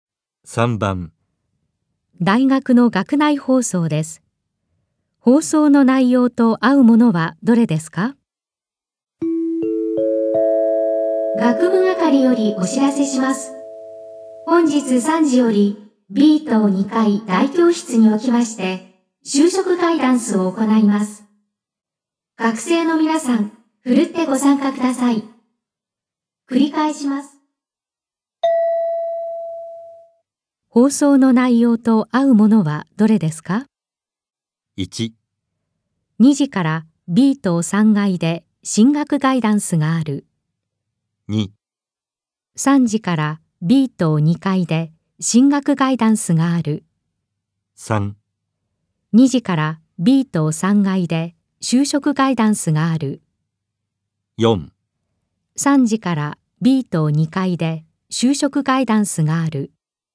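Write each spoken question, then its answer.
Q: 放送の内容と合うものはどれですか?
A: 4: 3時から B 棟2階で就職ガイダンスがある。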